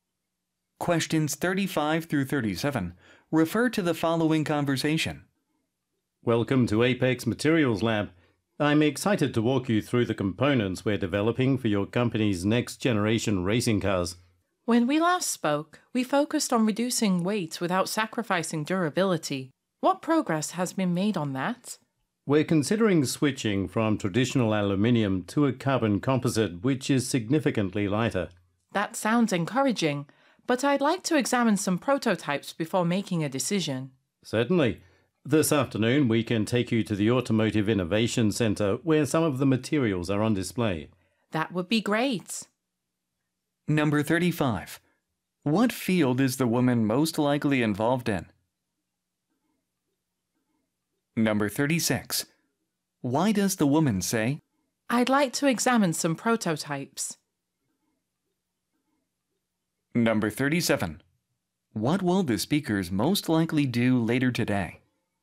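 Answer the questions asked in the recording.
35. Automotive (racing cars)
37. Visit the Automotive Innovation Center to see materials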